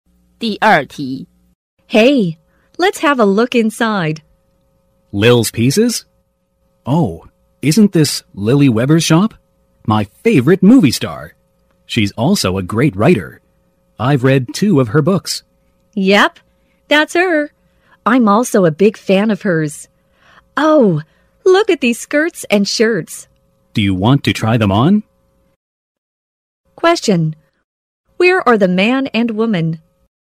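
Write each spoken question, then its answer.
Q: Where are the man and woman?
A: In a clothes shop (Lily Weber's shop)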